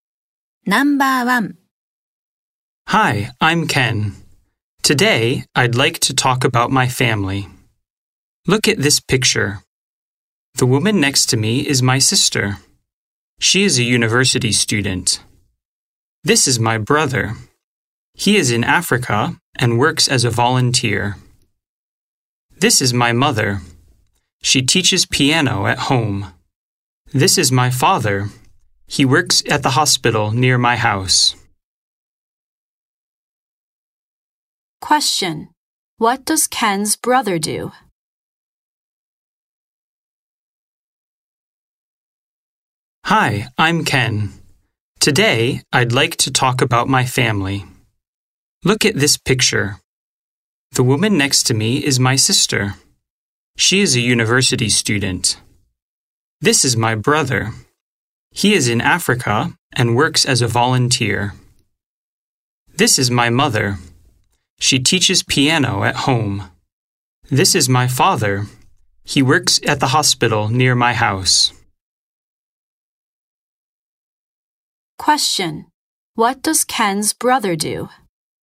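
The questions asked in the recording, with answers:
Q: What does Ken's brother do?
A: He works as a volunteer in Africa.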